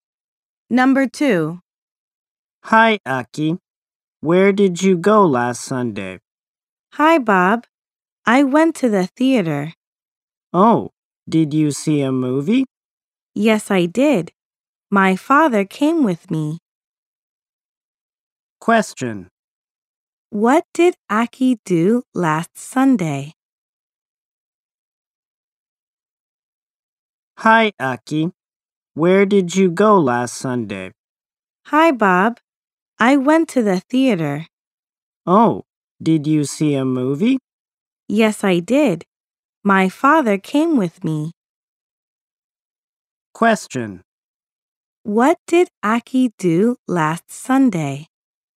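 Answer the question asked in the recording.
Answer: She saw a movie at the theater.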